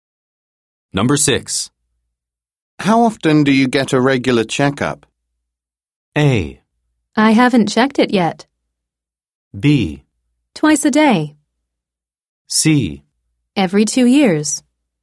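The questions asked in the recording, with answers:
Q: How often do you get a regular checkup?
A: C: Every 2 years.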